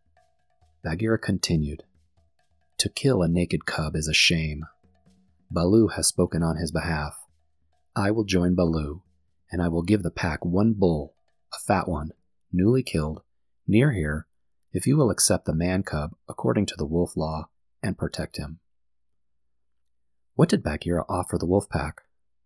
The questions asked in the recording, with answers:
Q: What did Bagheera offer the wolf pack?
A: Bagheera the panther offered the wolf pack a freshly killed bull for them to eat.